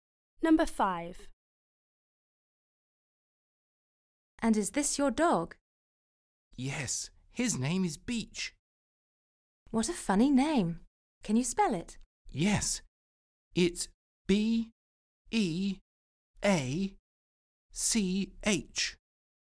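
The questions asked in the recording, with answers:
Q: And is this your dog?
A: Yes, his name is Beach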